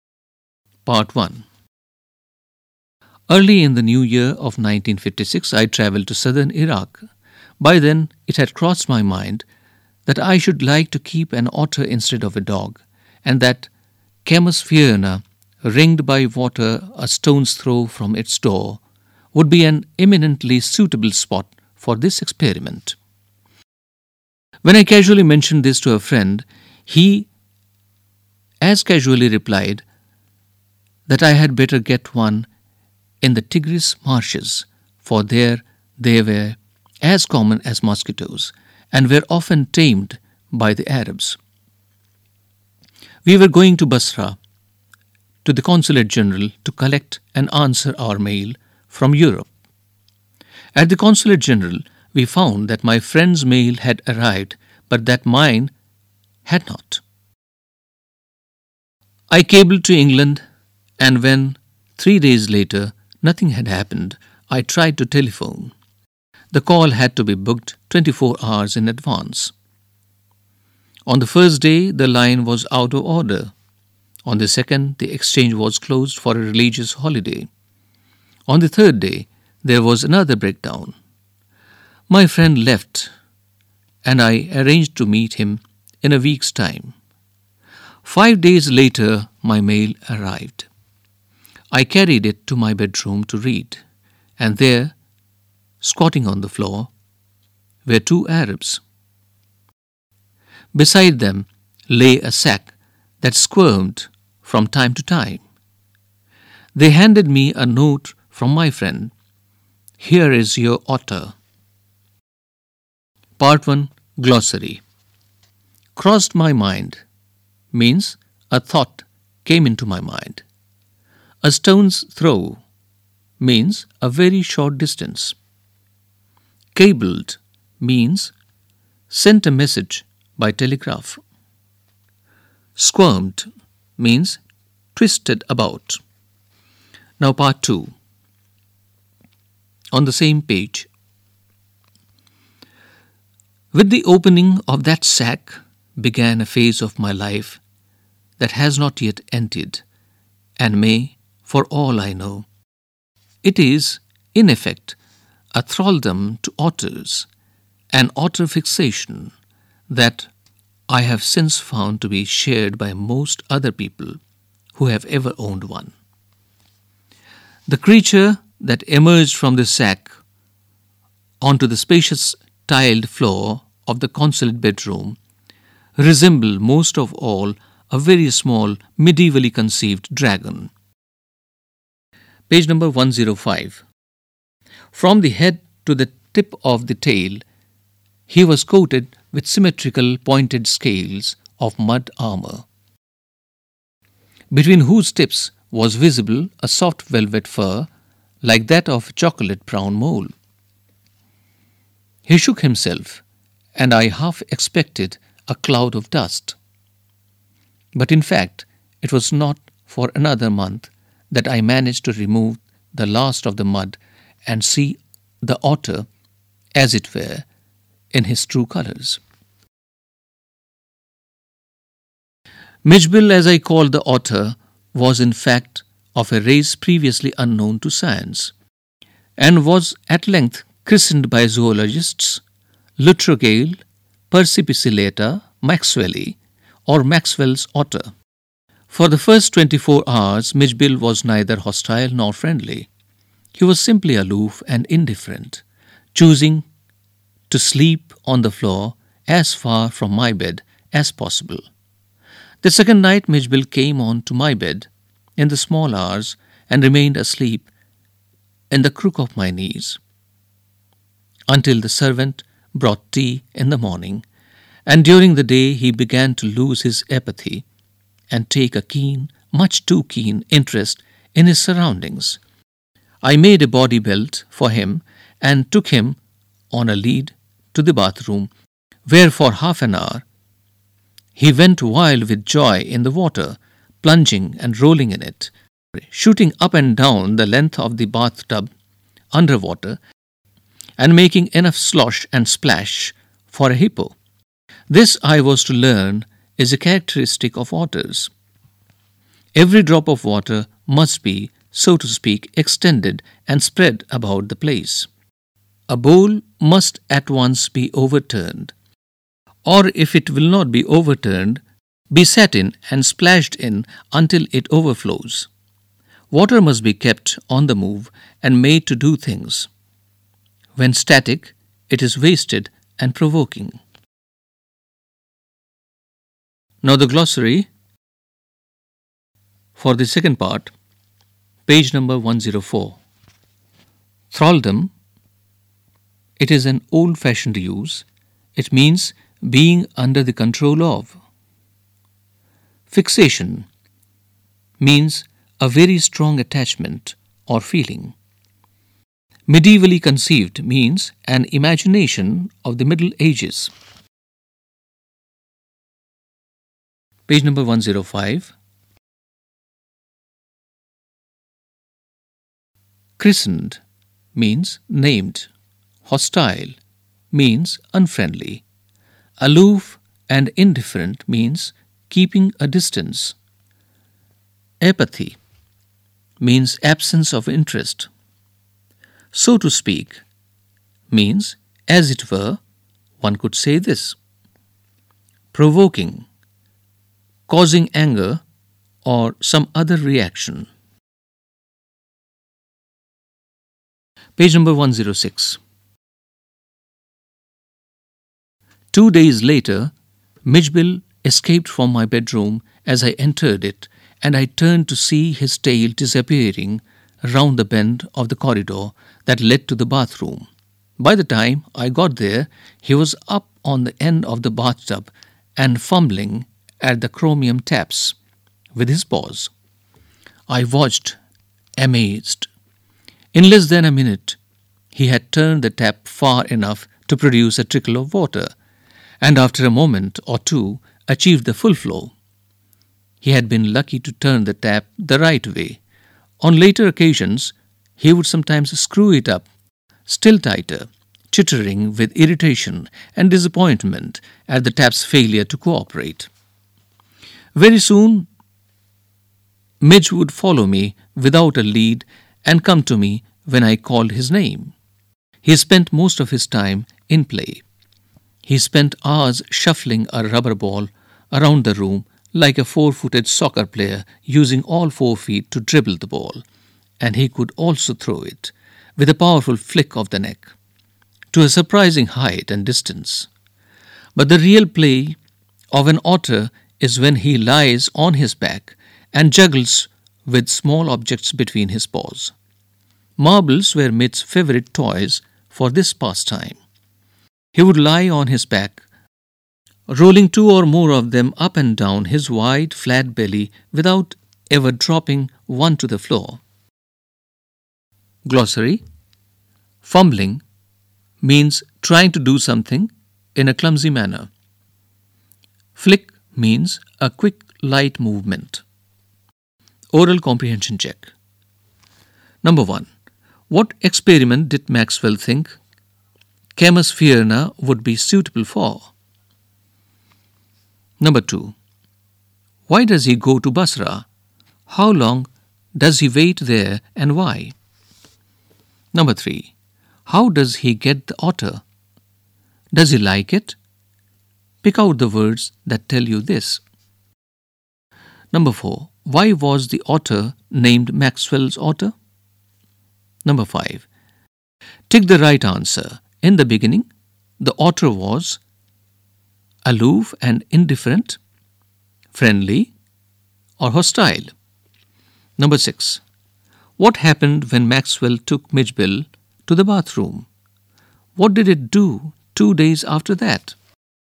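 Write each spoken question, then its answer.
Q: What experiment did Maxwell think Camus Fierna would be suitable for?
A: Keeping an otter as a pet instead of a dog

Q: How does he get the otter? Does he like it? Pick out the words that tell you this.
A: His friend sent it in a sack with two Arabs; yes, he became fixated on otters ('a thraldom to otters, an otter fixation')

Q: Why was the otter named Maxwell's otter?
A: It was of a race previously unknown to science, so zoologists named it after Maxwell

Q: Tick the right answer. In the beginning, the otter was aloof and indifferent, friendly, or hostile?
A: aloof and indifferent

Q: What happened when Maxwell took Midgebill to the bathroom? What did it do 2 days after that?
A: He went wild with joy in the water; two days later he escaped to the bathroom and turned on the tap himself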